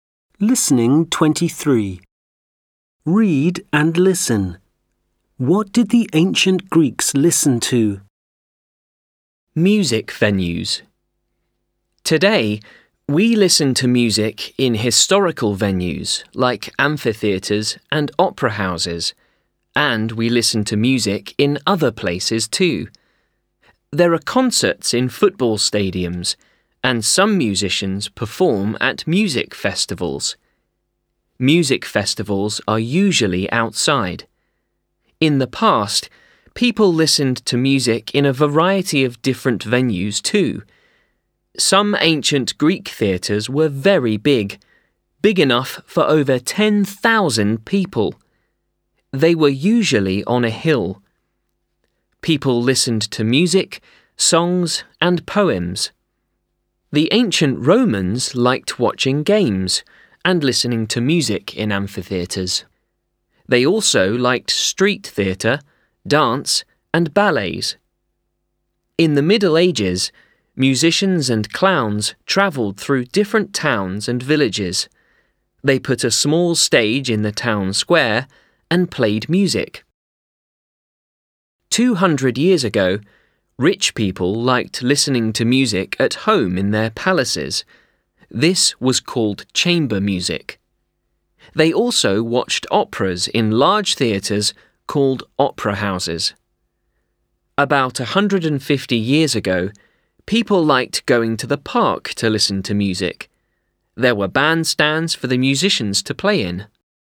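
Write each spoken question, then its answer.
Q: What did the ancient Greeks listen to?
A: Music, songs, and poems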